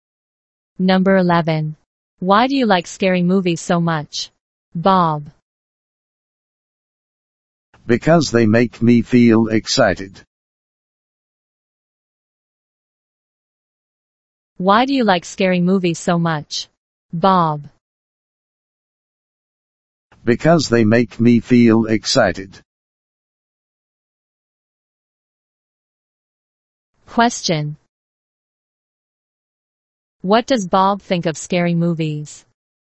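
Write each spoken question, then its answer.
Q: What does Bob think of scary movies?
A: They make him feel excited.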